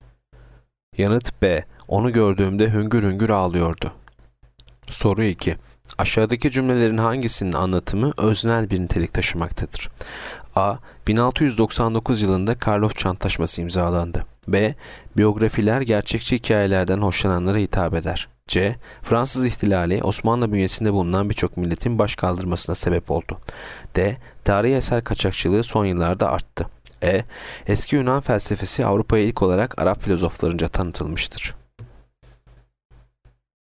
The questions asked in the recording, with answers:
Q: Aşağıdaki cümlelerin hangisinin anlatımı öznel bir nitelik taşımaktadır?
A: Yanıt B. Biyografiler gerçekçi hikayelerden hoşlananlara hitap eder.